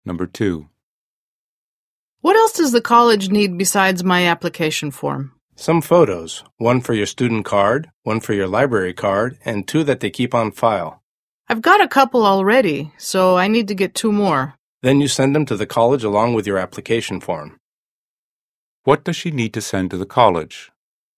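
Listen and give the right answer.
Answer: Four photos along with her application form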